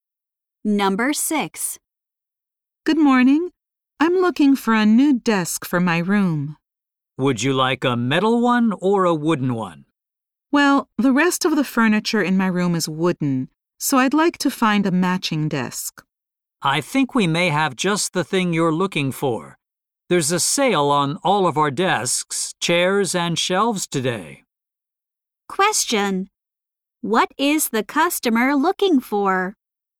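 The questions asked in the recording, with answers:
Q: What is the customer looking for?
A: A wooden desk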